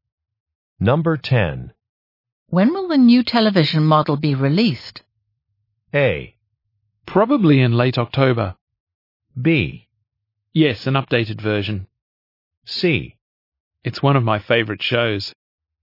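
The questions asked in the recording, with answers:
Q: When will the new television model be released?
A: A: Probably in late October.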